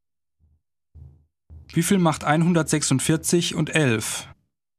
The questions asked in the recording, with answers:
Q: Wie viel macht 146 und 11?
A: 157.